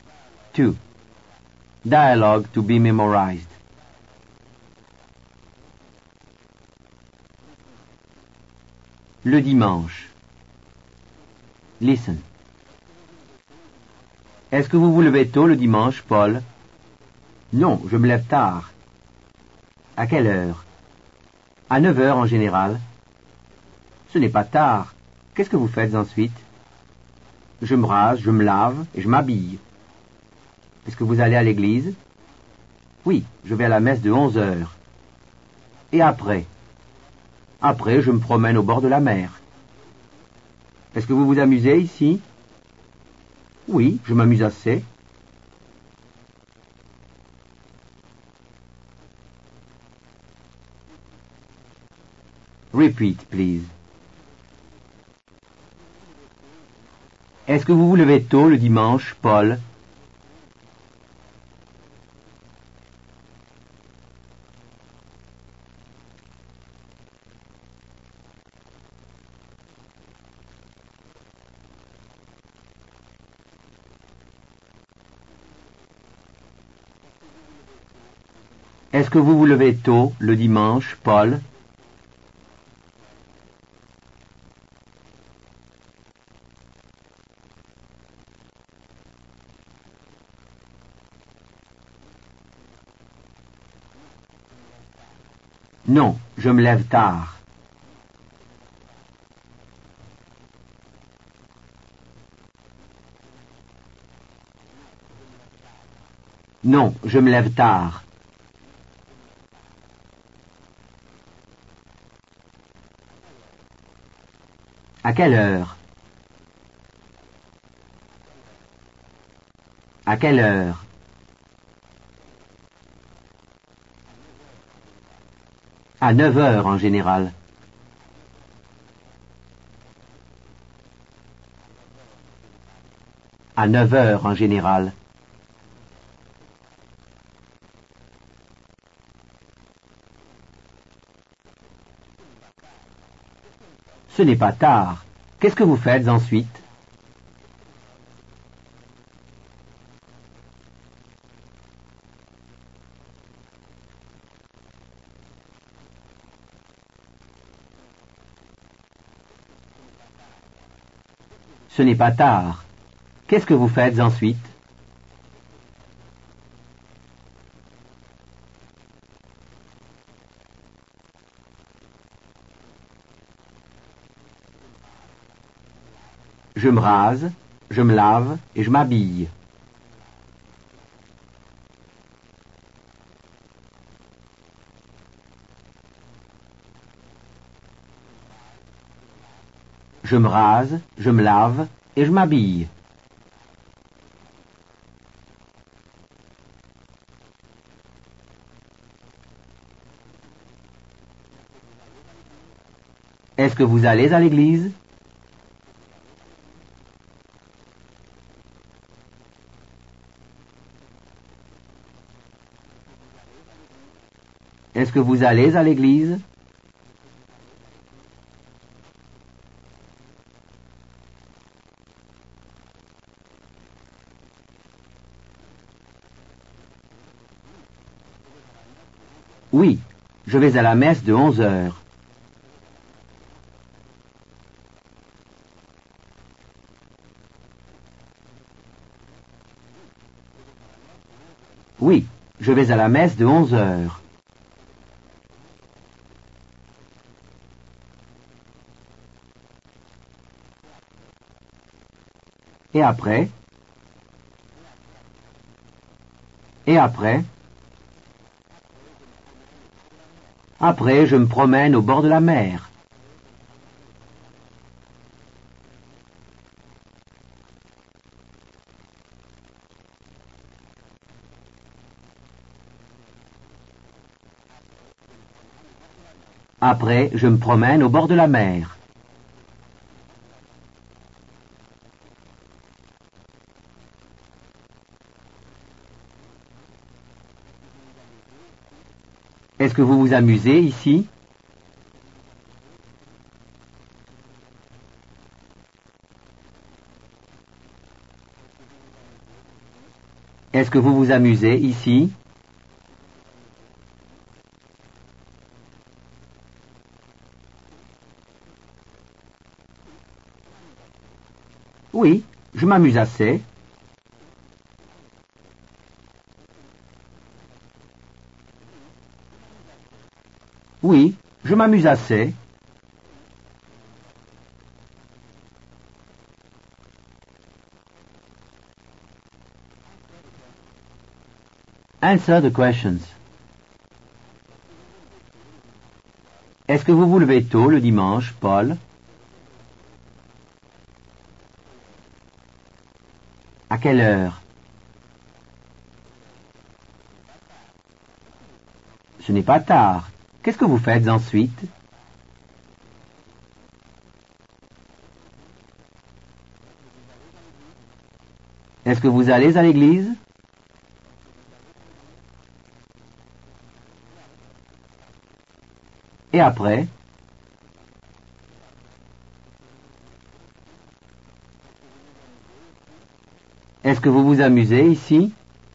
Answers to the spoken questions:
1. Non, je me lève tard.
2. À 9 heures en général.
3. Je me rase, je me lave et je m'habille.
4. Oui, je vais à la messe de 11 heures.
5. Après, je me promène au bord de la mer.
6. Oui, Je m'amuse assez.